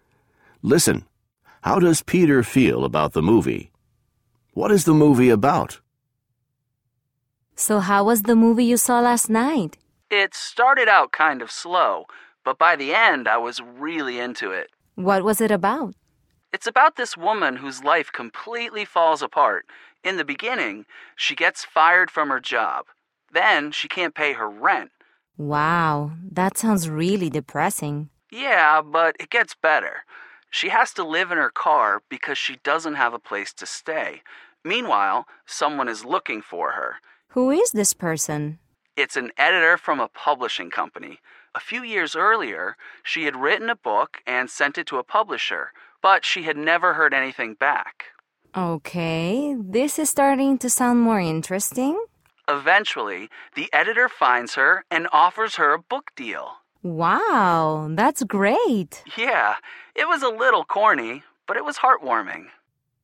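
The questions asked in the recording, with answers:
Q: How does Peter feel about the movie?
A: It started slow, but by the end he was really into it; a little corny but heartwarming

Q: What is the movie about?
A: A woman whose life falls apart, until an editor finds her and offers her a book deal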